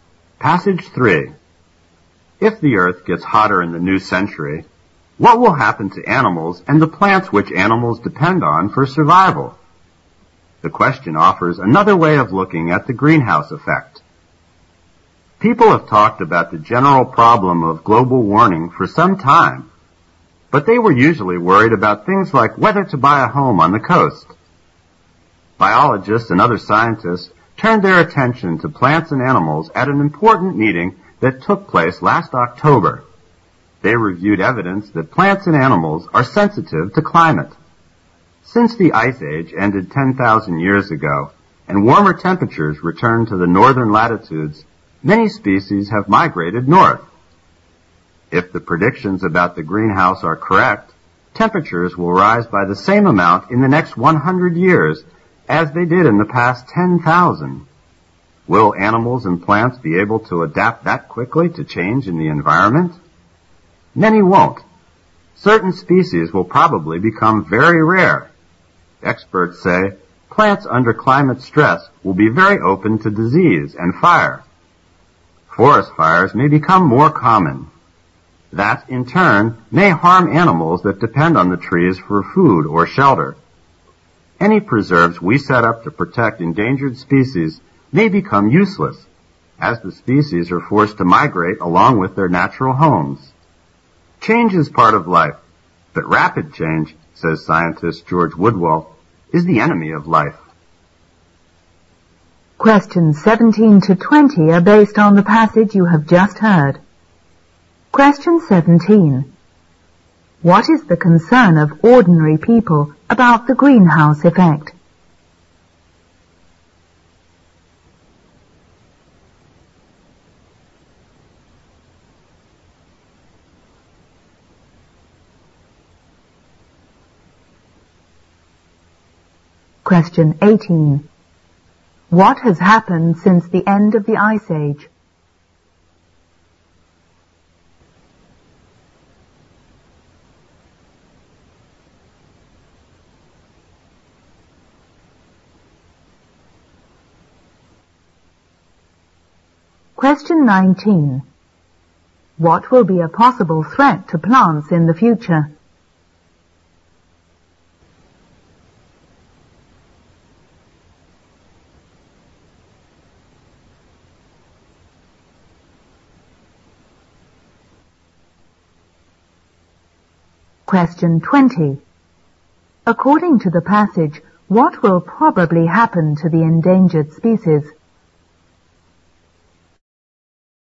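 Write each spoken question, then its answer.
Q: What is the concern of ordinary people about the greenhouse effect?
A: Whether to buy a home on the coast

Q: What has happened since the end of the Ice Age?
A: Many species have migrated north

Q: What will be a possible threat to plants in the future?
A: Disease and fire caused by climate stress

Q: According to the passage, what will probably happen to the endangered species?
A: They will be forced to migrate with their natural homes, making preserves useless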